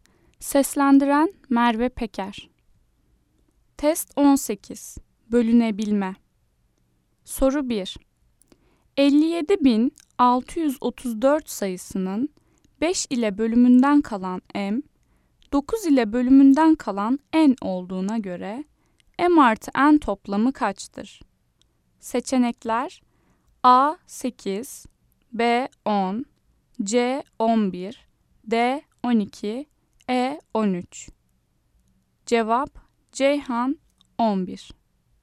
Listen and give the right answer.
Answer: Ceyhan 11